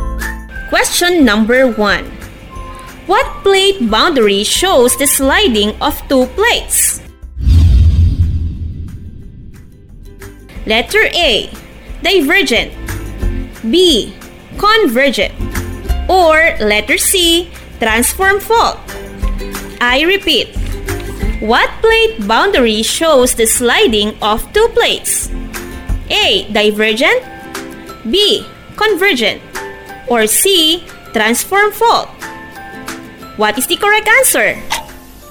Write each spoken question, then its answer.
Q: What plate boundary shows the sliding of two plates?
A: The answer is letter C. Transform fault boundary where the two plates slide or pass each other.